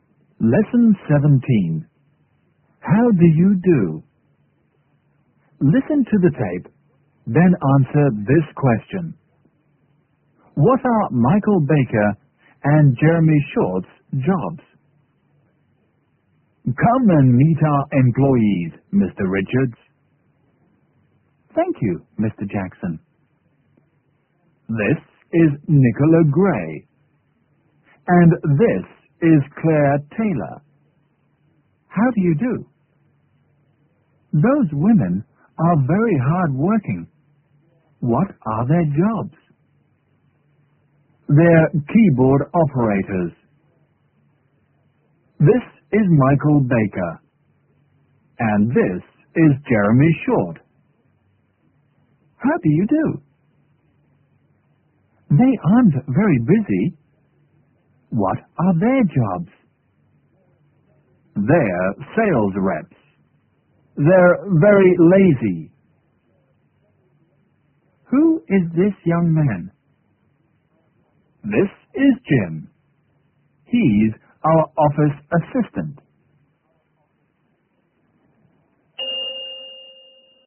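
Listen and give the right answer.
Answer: They're sales reps.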